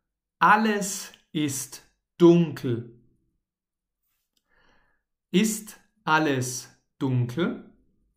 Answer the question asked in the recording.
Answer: Ja, alles ist dunkel.